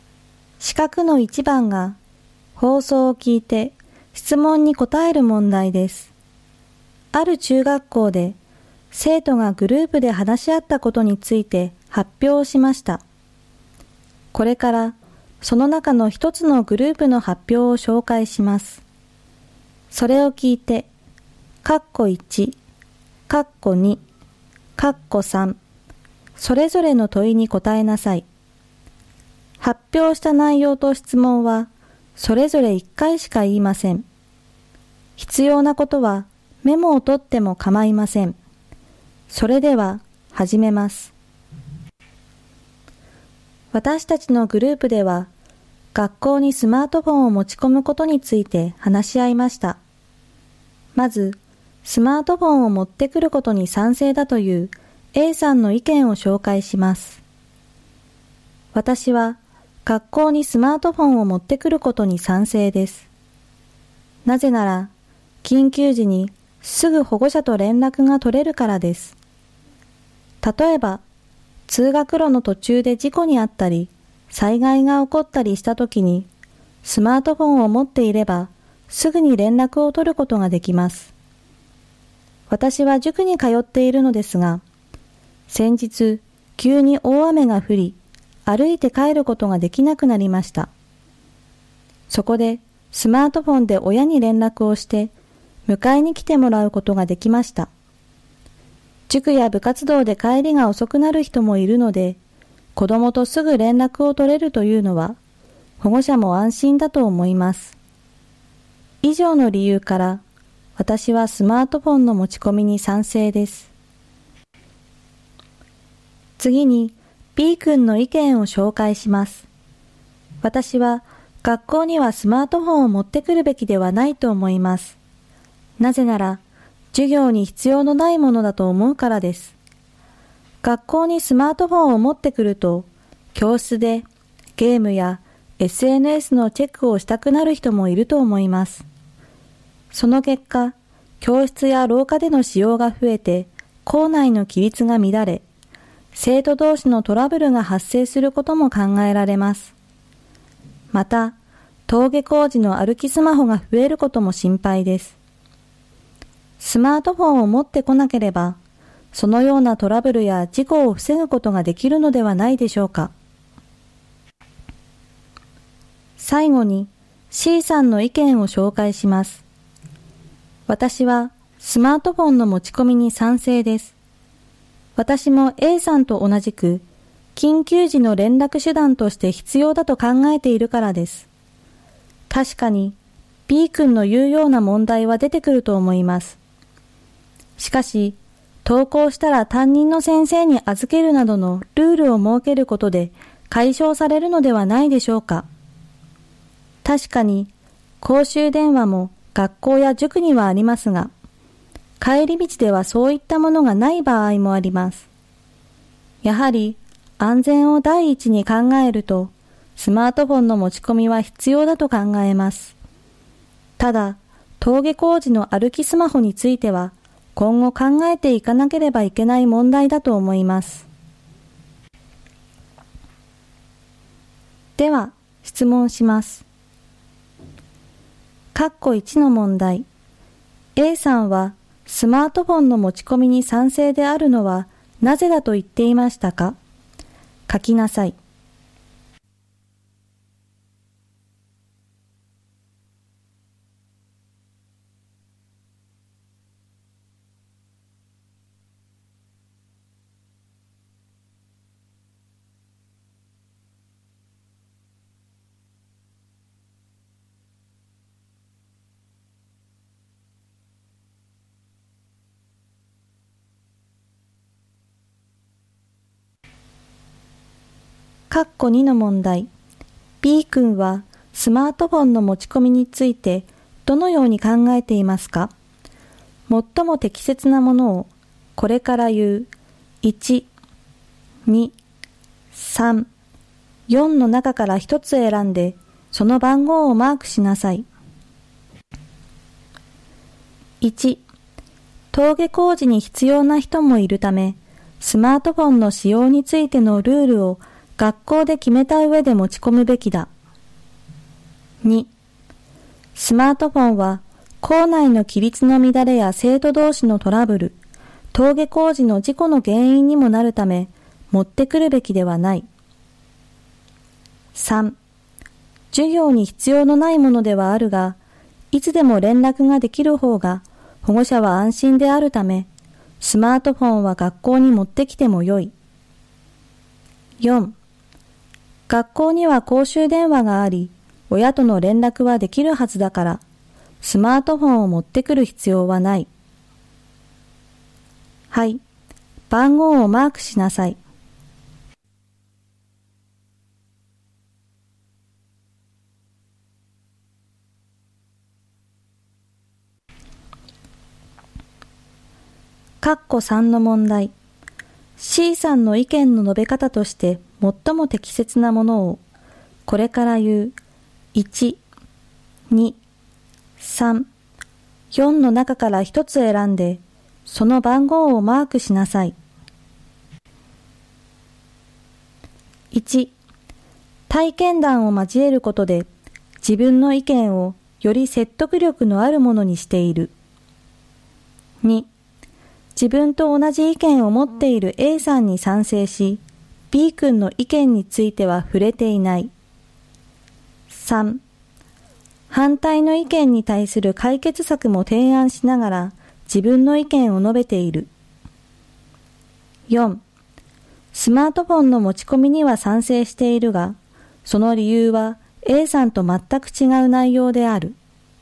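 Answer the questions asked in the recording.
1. 緊急時にすぐ保護者と連絡が取れるから
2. 2: スマートフォンは校内の規律の乱れや生徒同士のトラブル、登下校時の事故の原因にもなるため、持ってくるべきではない。
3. 3: 反対の意見に対する解決策も提案しながら、自分の意見を述べている。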